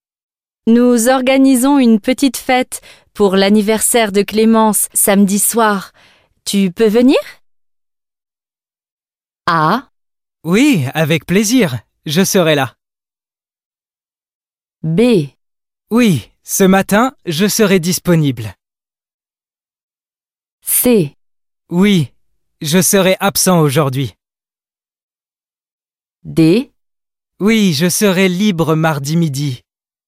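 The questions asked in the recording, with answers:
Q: Tu peux venir?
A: A: Oui, avec plaisir. Je serai là.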